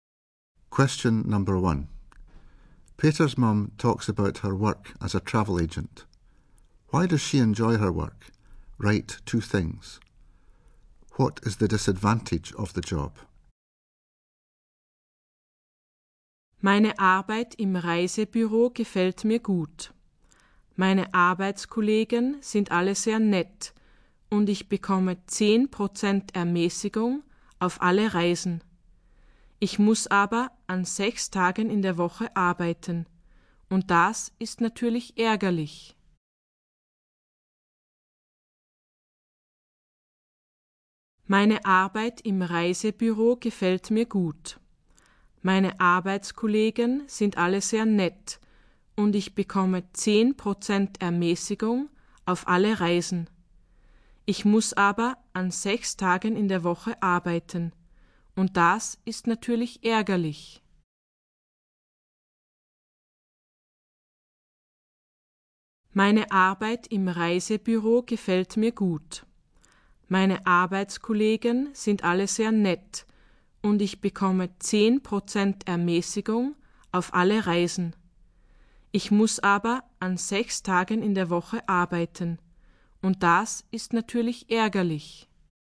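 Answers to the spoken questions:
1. Colleagues are very nice; she gets 10% discount on all trips
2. She has to work 6 days a week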